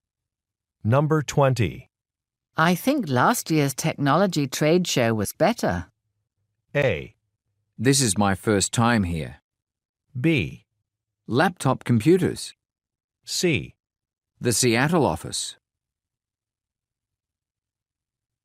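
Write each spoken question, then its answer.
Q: I think last year's technology trade show was better.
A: A: This is my first time here.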